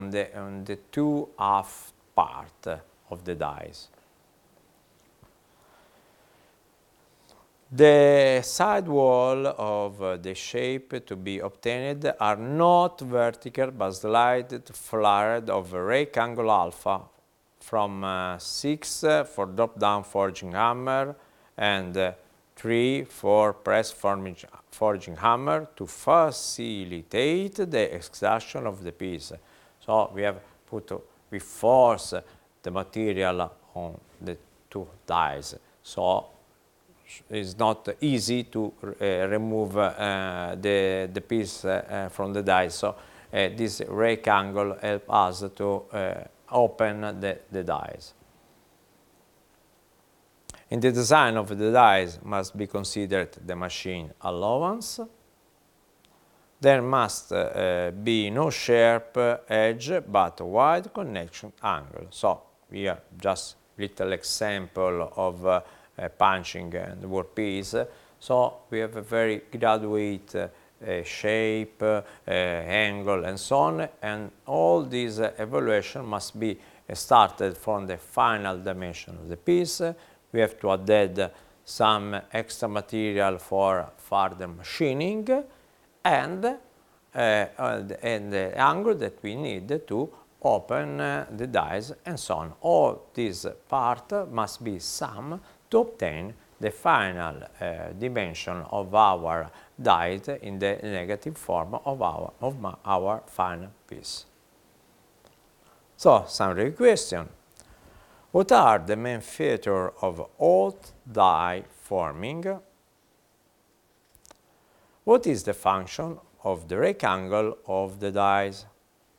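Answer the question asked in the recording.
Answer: To help open the dies and make it easier to extract the piece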